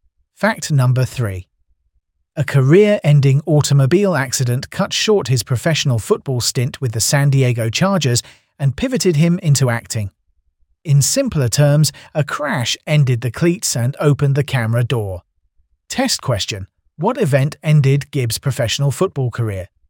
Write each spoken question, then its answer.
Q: What event ended Gibb's professional football career?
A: Correct answer. An automobile accident.